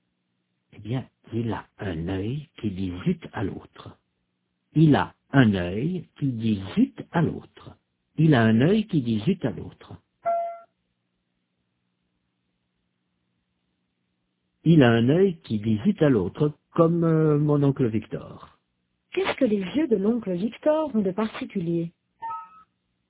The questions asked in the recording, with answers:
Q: Qu'est-ce que les yeux de l'oncle Victor ont de particulier?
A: Il a un œil qui dit zut à l'autre.